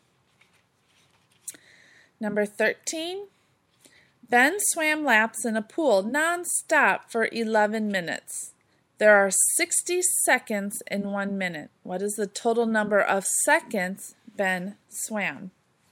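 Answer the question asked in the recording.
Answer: 660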